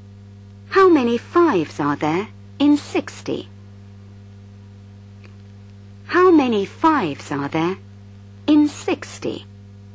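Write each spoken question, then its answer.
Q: How many fives are there in 60?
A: 12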